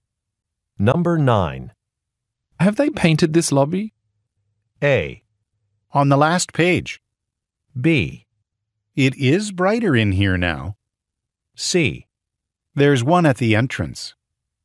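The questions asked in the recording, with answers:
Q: Have they painted this lobby?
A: B: It is brighter in here now.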